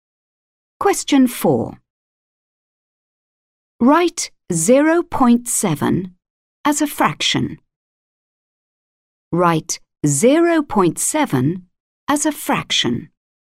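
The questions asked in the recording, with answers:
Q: Write 0.7 as a fraction.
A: 7/10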